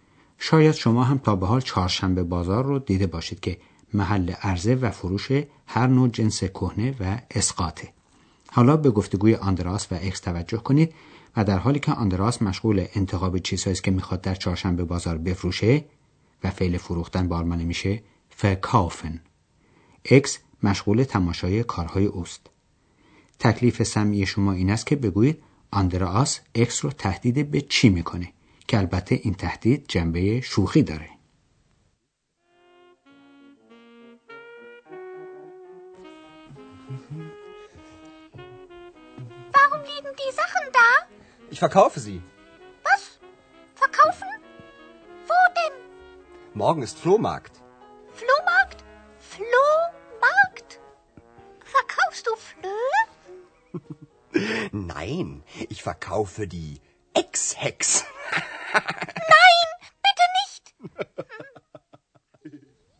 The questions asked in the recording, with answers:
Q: تکلیف سمی شما این است که بگویید آندراس اکس رو تهدید به چی میکنه، که البته این تهدید جنبه شوخی داره.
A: پس تهدید آندراس این بود که اکس رو هم همراه با اشیاء کهنه‌اش خواهد فروخت